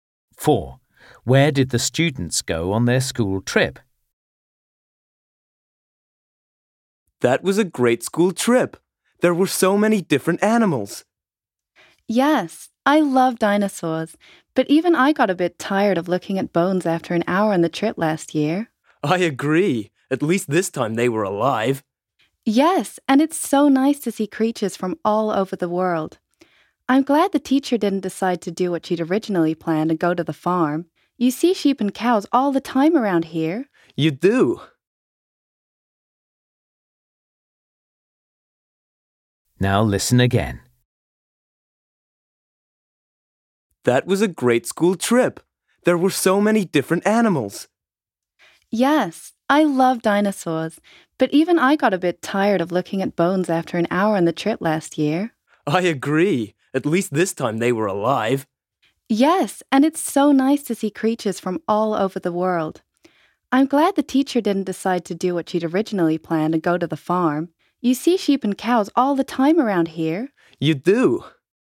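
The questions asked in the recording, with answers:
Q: Where did the students go on their school trip?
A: the zoo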